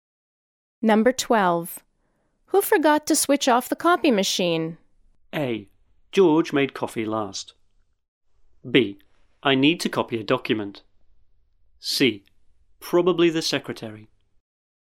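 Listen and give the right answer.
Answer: C: Probably the secretary.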